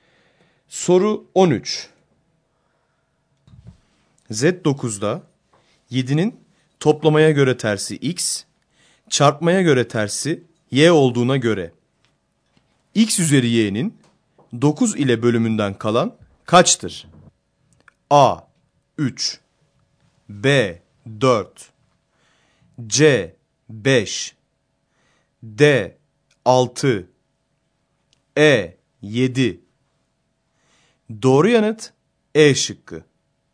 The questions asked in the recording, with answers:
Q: Z9'da 7'nin toplamaya göre tersi x, çarpmaya göre tersi y olduğuna göre x üzeri y'nin 9 ile bölümünden kalan kaçtır?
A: Doğru yanıt E şıkkı.